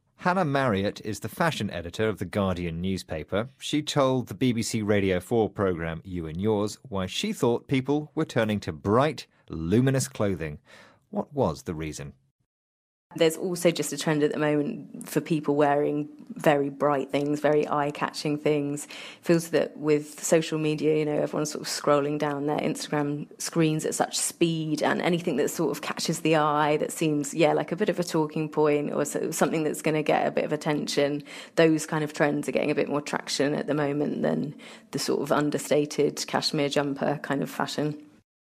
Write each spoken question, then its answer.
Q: What was the reason?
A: So her reason is social media.